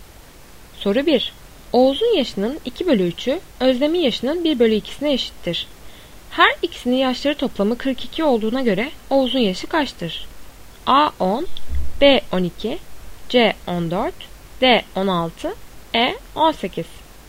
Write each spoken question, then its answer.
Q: Her ikisinin yaşları toplamı 42 olduğuna göre Oğuz'un yaşı kaçtır?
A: Doğru cevap E 18.